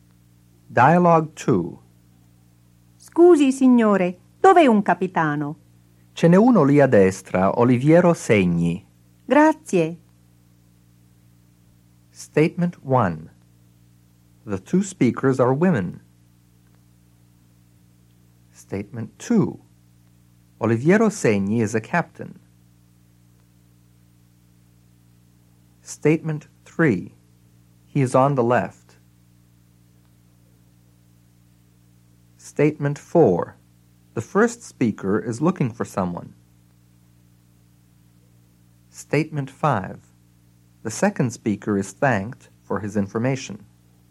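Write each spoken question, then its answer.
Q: The two speakers are women.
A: False

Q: Oliviero Segni is a captain.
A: True

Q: He is on the left.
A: False

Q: The first speaker is looking for someone.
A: True

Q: The second speaker is thanked for his information.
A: True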